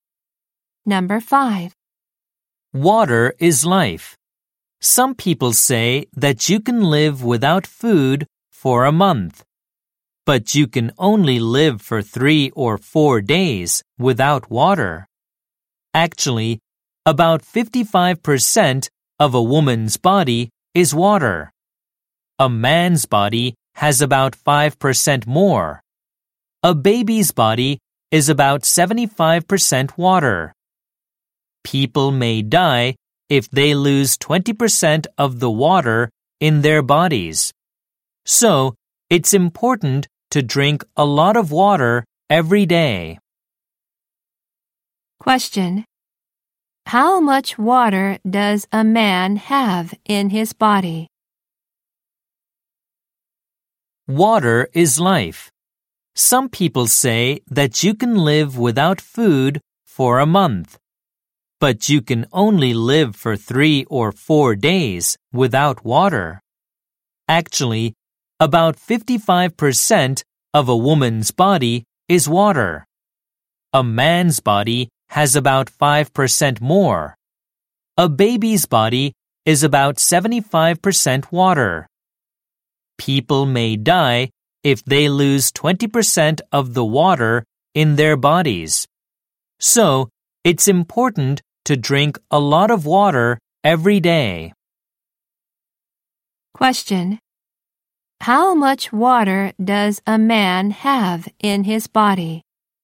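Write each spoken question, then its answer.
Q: How much water does a man have in his body?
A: About 60%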